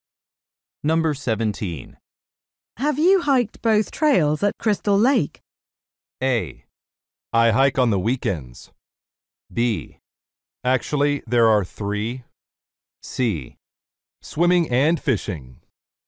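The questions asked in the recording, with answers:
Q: Have you hiked both trails at Crystal Lake?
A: B: Actually, there are three.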